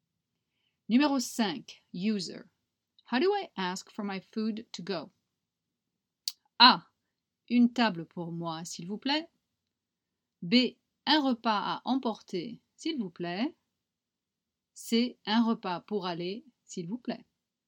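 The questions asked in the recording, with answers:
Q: How do I ask for my food to go?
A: B: Un repas à emporter, s'il vous plaît.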